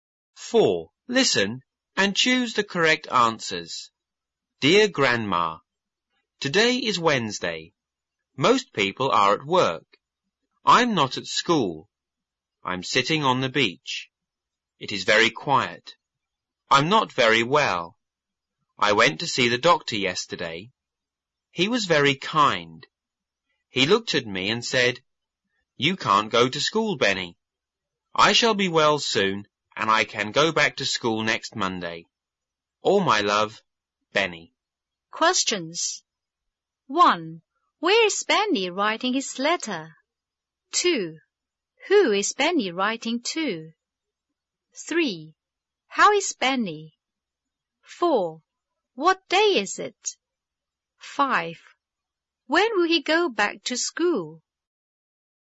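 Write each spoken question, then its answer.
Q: Where is Benny writing his letter?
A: On the beach

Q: Who is Benny writing to?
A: His grandma

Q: How is Benny?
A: He is not very well

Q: What day is it?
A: Wednesday

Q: When will he go back to school?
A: Next Monday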